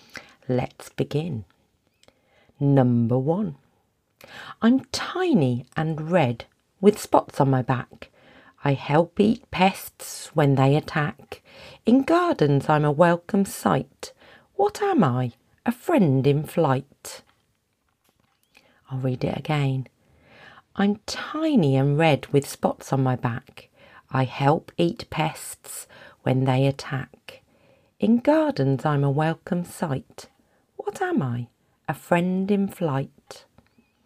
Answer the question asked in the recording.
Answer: Of course, the answer is a ladybird, or you might call them a ladybug.